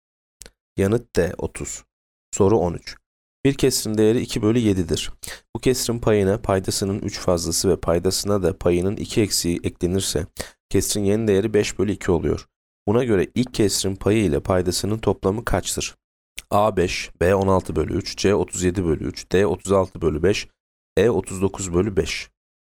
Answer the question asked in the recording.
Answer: Yanıt B 16 bölü 3.